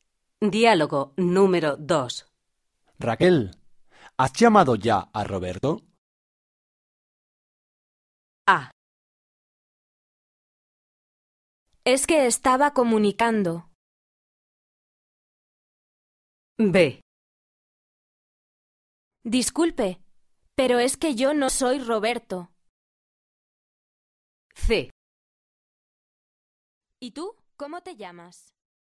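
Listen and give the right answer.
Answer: A: Es que estaba comunicando.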